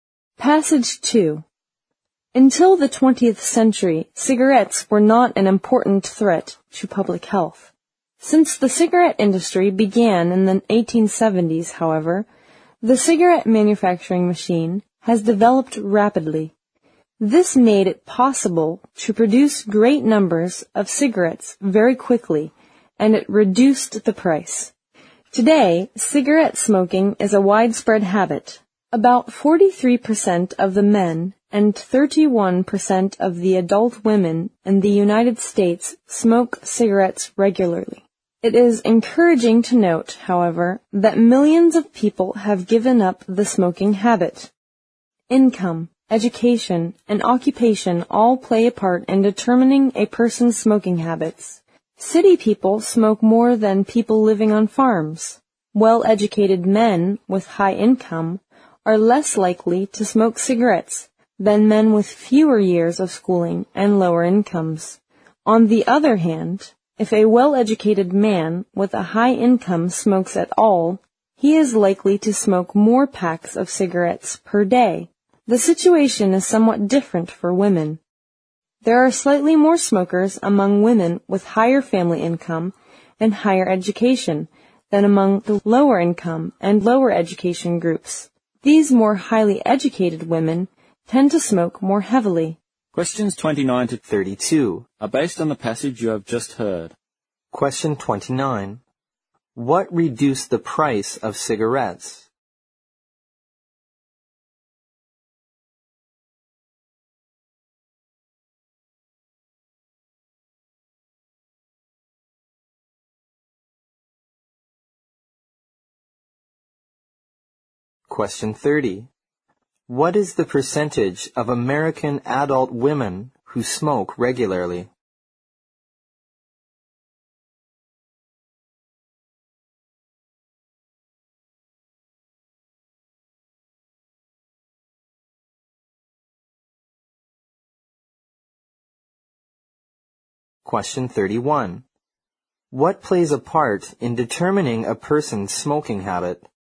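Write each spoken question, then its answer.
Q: What reduced the price of cigarettes?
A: The cigarette manufacturing machine

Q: What is the percentage of American adult women who smoke regularly?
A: 31%

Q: What plays a part in determining a person's smoking habit?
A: Income, education and occupation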